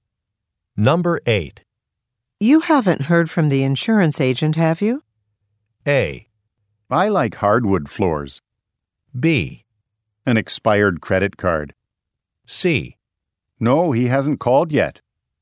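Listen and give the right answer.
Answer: C: No, he hasn't called yet.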